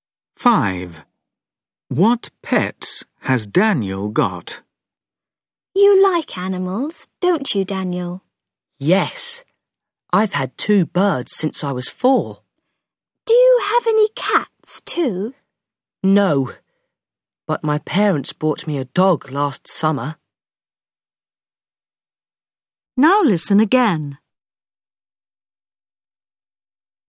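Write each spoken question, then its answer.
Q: What pets has Daniel got?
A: two birds and a dog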